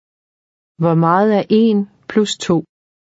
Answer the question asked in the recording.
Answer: 3. 3.